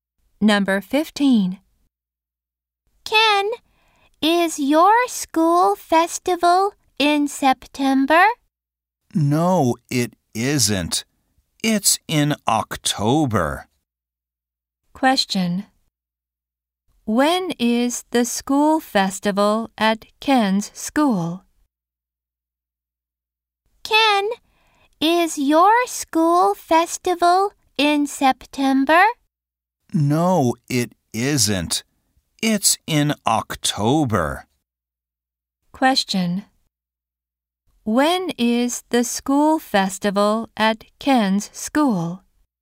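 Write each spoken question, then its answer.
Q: When is the school festival at Ken's school?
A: In October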